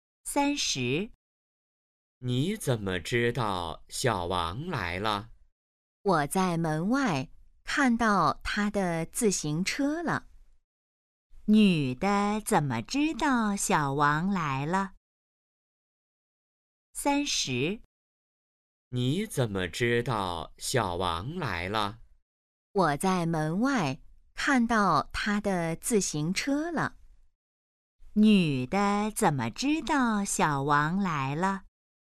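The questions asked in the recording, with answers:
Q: 女的怎么知道小王来了?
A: 她在门外看到了小王的自行车。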